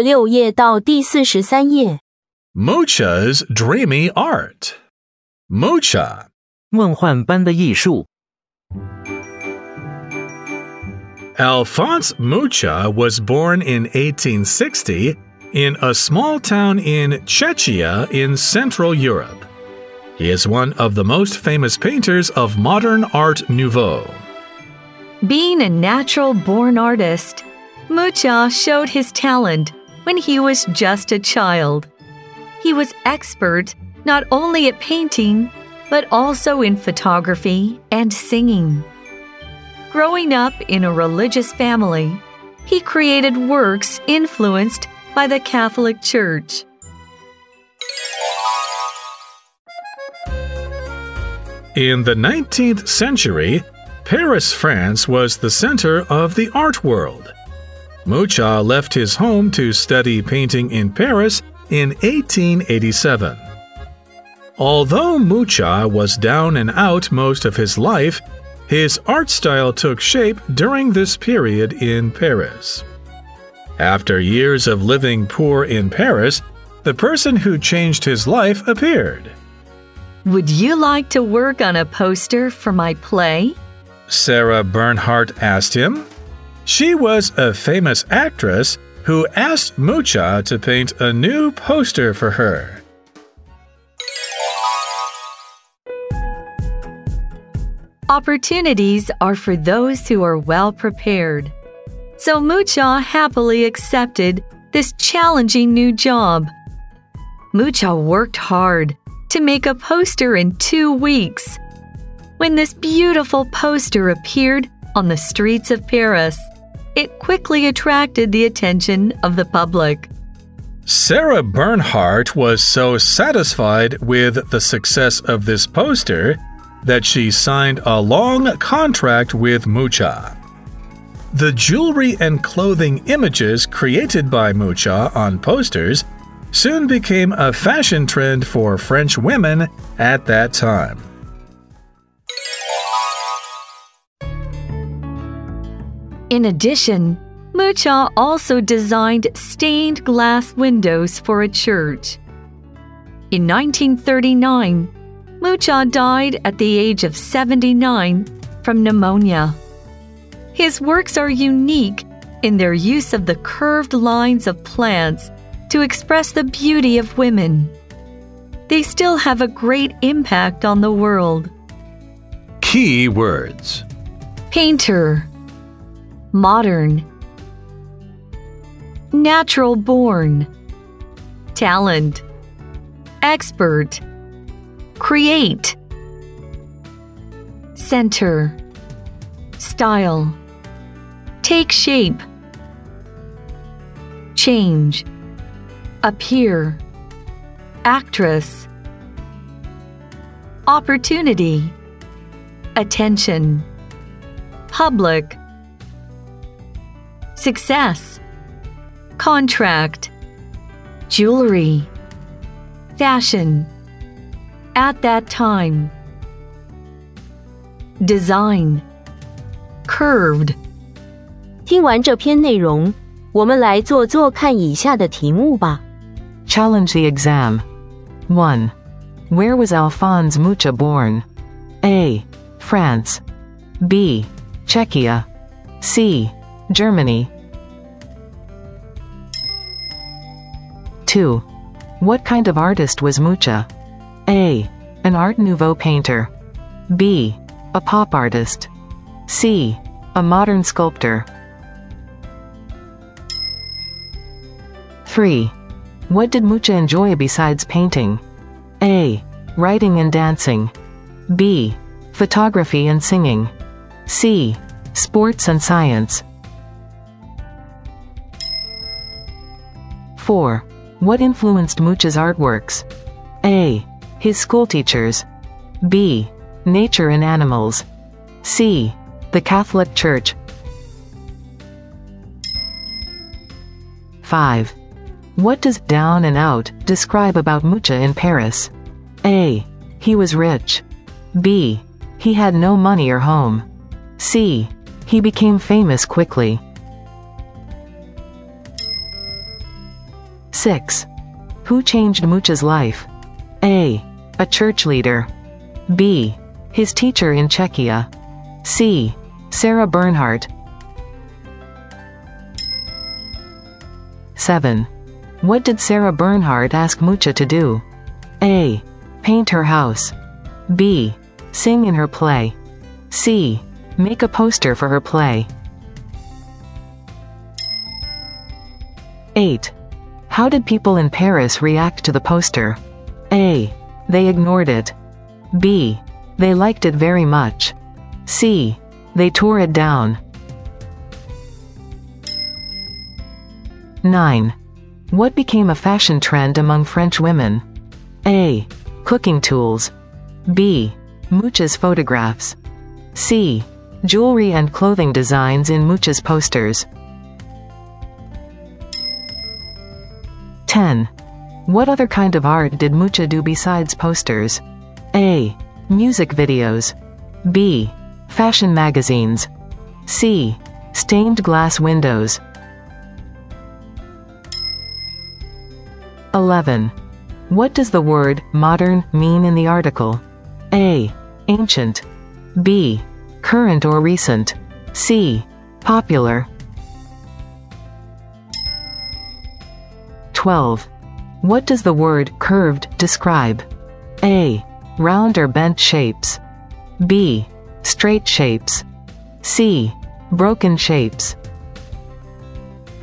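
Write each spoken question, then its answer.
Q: Where was Alphonse Mucha born?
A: B: Czechia

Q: What kind of artist was Mucha?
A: A: An Art Nouveau painter

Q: What did Mucha enjoy besides painting?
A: B: Photography and singing

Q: What influenced Mucha's artworks?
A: C: The Catholic Church

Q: What does down and out describe about Mucha in Paris?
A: B: He had no money or home

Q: Who changed Mucha's life?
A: C: Sarah Bernhardt

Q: What did Sarah Bernhardt ask Mucha to do?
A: C: Make a poster for her play

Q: How did people in Paris react to the poster?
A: B: They liked it very much

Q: What became a fashion trend among French women?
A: C: Jewelry and clothing designs in Mucha's posters

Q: What other kind of art did Mucha do besides posters?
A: C: Stained glass windows

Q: What does the word modern mean in the article?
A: B: Current or recent

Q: What does the word curved describe?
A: A: Round or bent shapes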